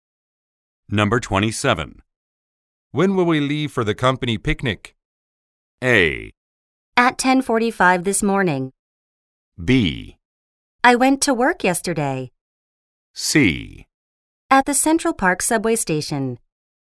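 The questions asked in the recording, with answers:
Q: When will we leave for the company picnic?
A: A: At 10:45 this morning.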